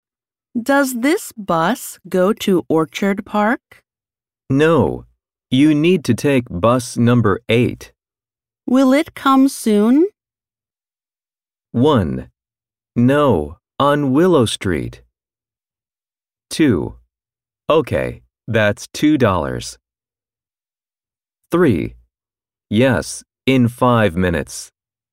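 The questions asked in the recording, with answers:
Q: Will it come soon?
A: 3: Yes, in five minutes.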